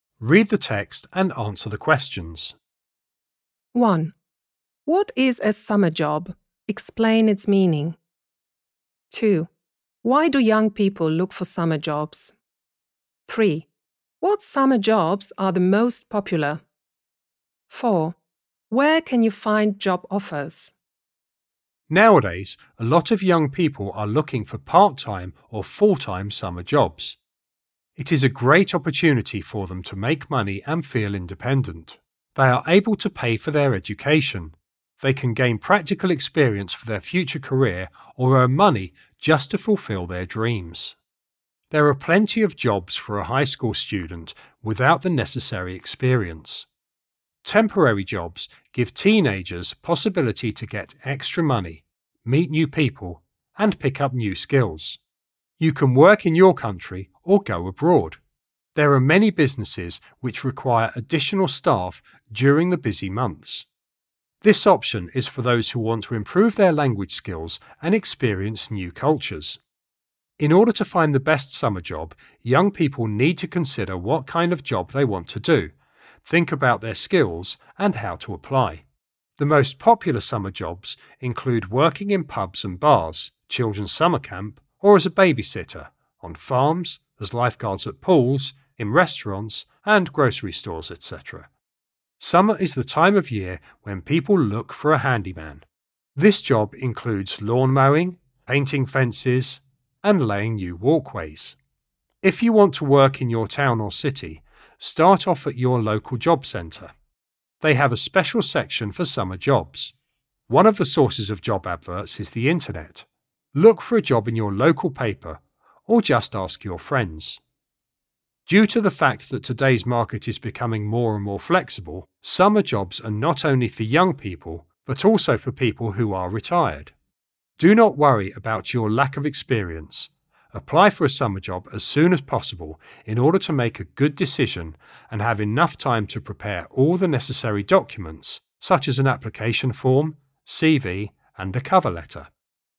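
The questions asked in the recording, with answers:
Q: Why do young people look for summer jobs?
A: To make money, feel independent, pay for education and gain practical experience

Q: What summer jobs are the most popular?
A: Working in pubs and bars, at children's summer camps, as a babysitter, on farms, as lifeguards, in restaurants and grocery stores

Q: Where can you find job offers?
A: At the local job centre, on the internet, in the local paper, or by asking friends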